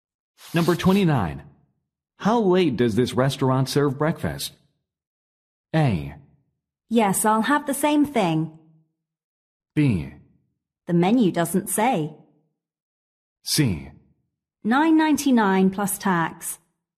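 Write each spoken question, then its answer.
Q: How late does this restaurant serve breakfast?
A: B: The menu doesn't say.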